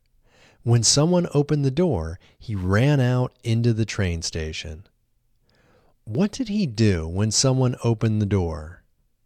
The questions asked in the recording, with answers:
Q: What did he do when someone opened the door?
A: He ran out into the train station when someone opened the door.